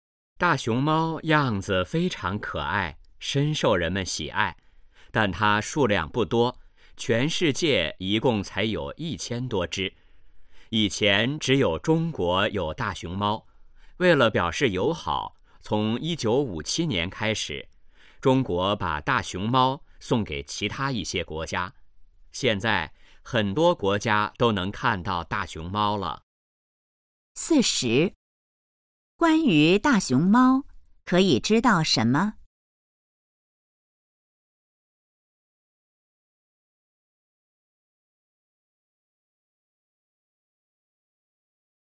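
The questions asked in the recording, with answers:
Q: 中国为什么要送大熊猫出国?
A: 为了表示友好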